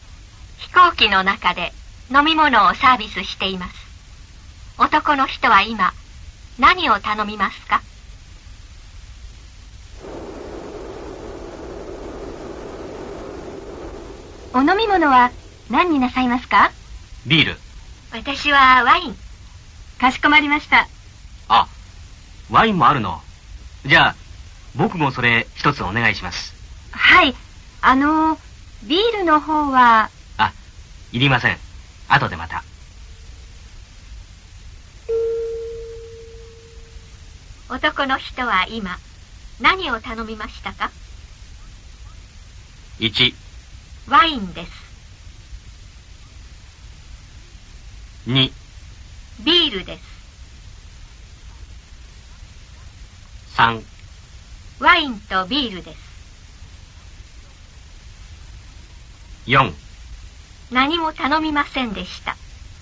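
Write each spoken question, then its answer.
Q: 男の人は今何を頼みましたか?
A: 1: ワインです。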